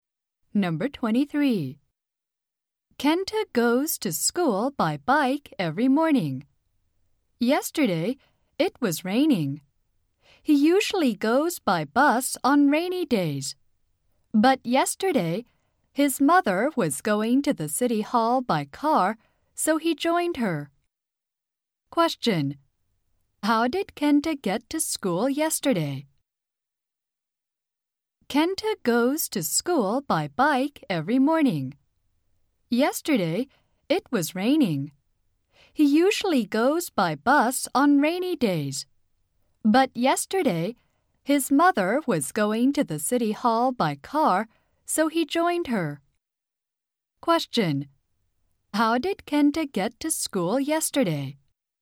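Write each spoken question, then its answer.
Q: How did Kenta get to school yesterday?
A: By car (with his mother)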